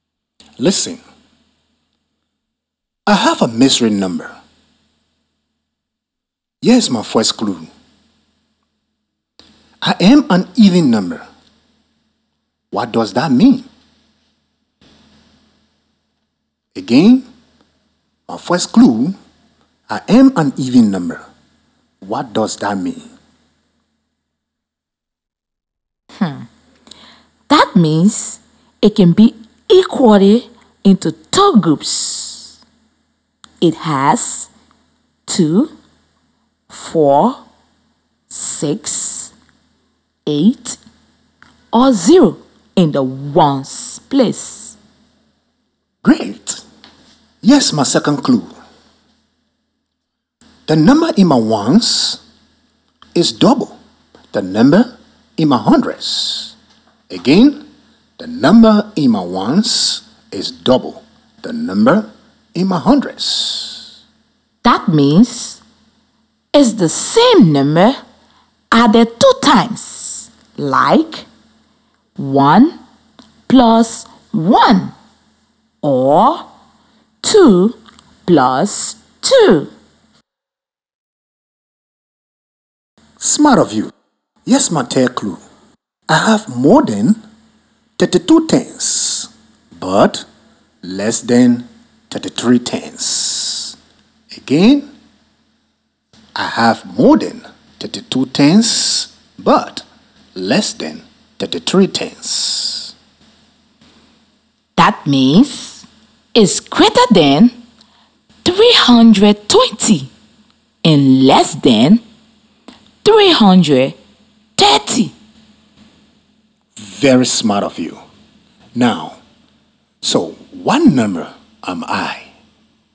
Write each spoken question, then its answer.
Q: Now, so what number am I?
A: The number has to be 326.